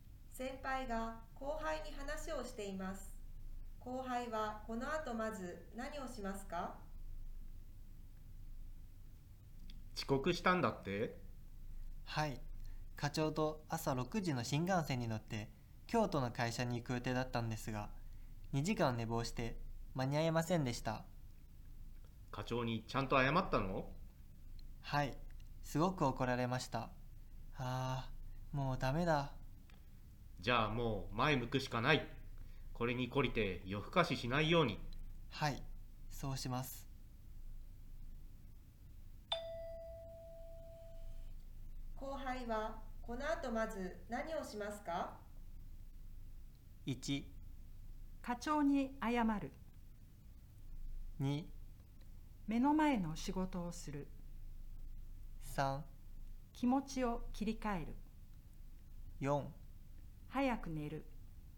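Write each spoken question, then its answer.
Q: 後輩はこの後まず何をしますか?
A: 3: 気持ちを切り替える。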